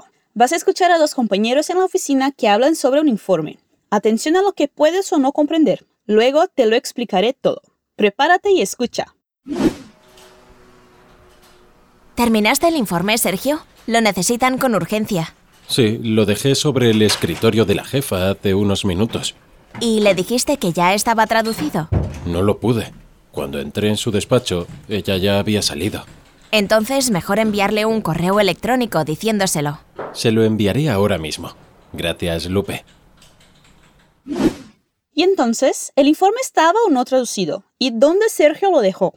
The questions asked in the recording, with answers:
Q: ¿Y dónde Sergio lo dejó?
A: Sí, lo dejé sobre el escritorio de la jefa hace unos minutos.